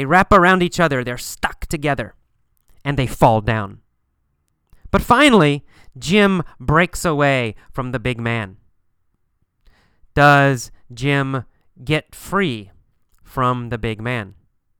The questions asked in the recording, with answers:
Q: Does Jim get free from the big man?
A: Yeah, that's right. He gets free.